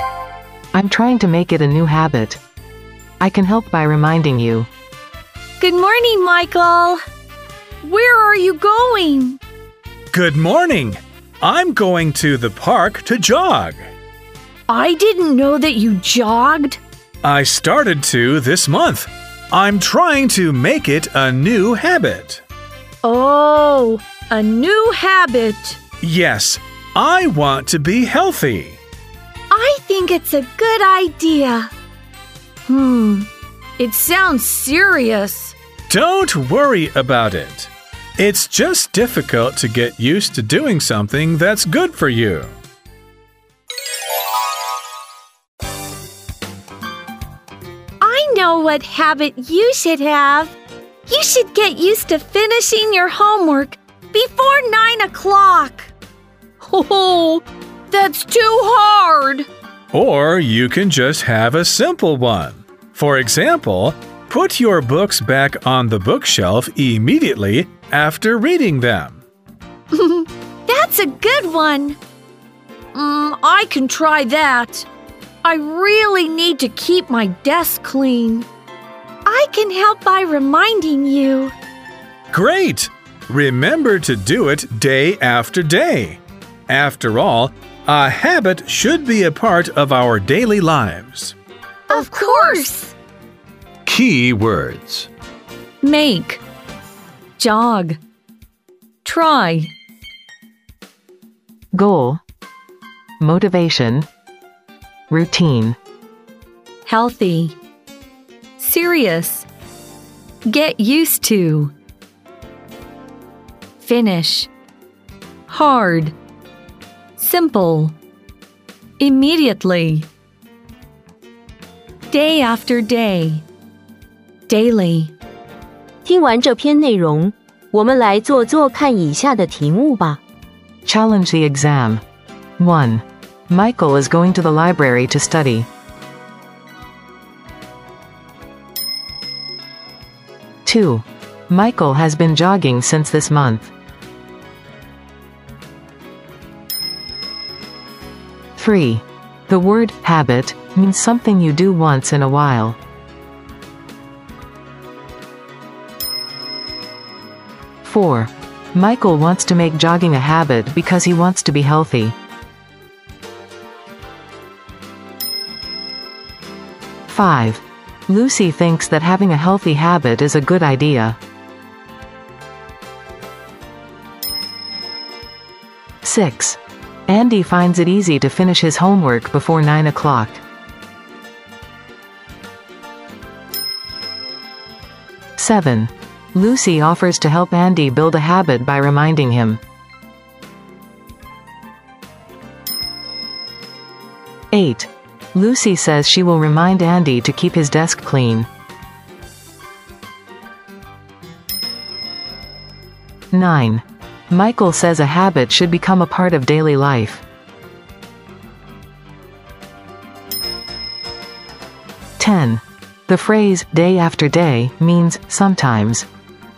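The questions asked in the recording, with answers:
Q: Michael is going to the library to study.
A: False

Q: Michael has been jogging since this month.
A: True

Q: The word habit means something you do once in a while.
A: False

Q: Michael wants to make jogging a habit because he wants to be healthy.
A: True

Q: The phrase day after day means sometimes.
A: False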